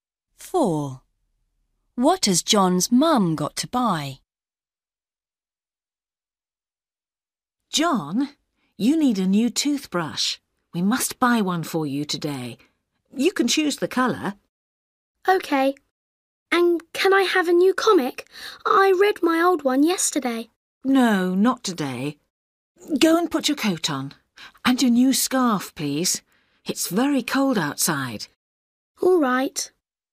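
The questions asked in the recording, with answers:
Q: What has John's mum got to buy?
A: A toothbrush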